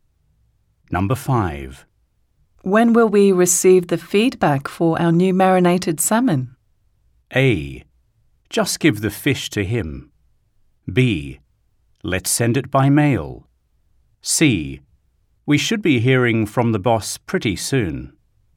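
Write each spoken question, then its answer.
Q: When will we receive the feedback for our new marinated salmon?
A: C: We should be hearing from the boss pretty soon.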